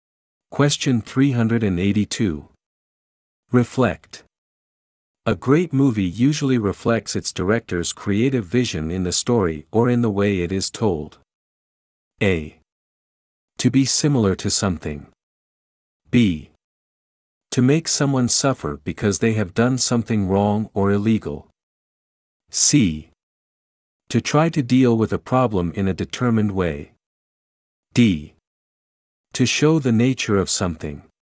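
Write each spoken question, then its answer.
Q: Reflect. A great movie usually reflects its director's creative vision in the story or in the way it is told.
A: D: To show the nature of something.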